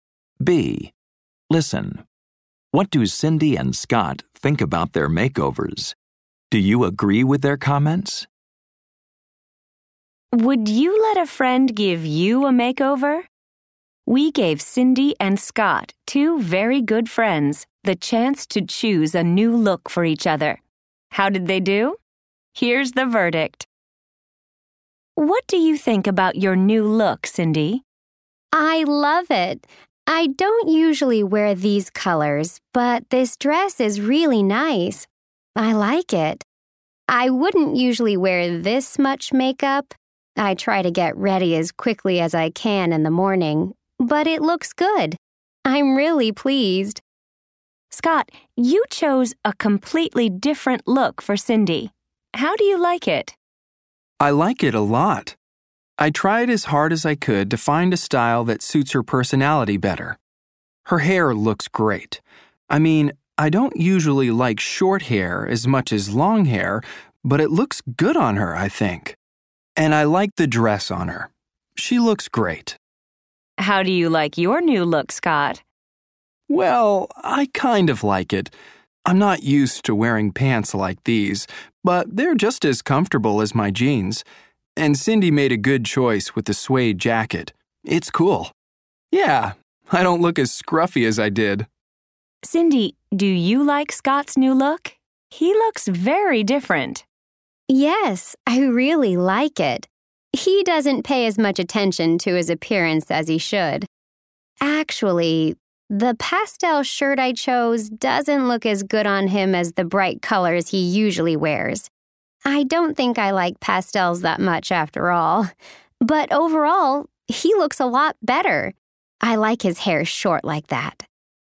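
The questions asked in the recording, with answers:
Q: What do Cindy and Scott think about their makeovers?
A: Overall, both like them. Cindy loves her new dress and look, though she usually wouldn't wear that much makeup. Scott likes his comfortable pants and suede jacket.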